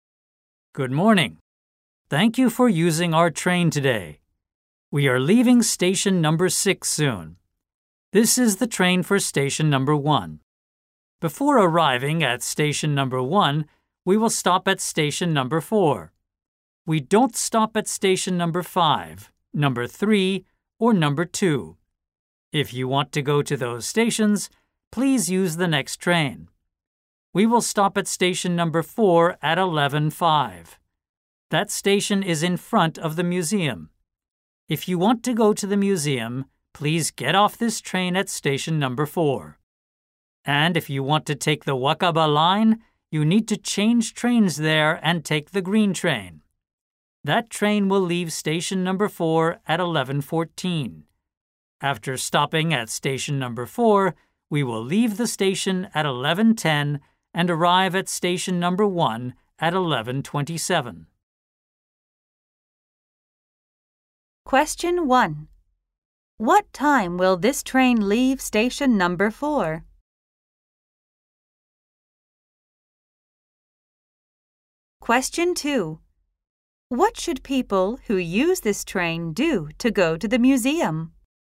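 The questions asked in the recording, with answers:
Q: What time will this train leave station number 4?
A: At 11:10

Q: What should people who use this train do to go to the museum?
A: Get off the train at station number 4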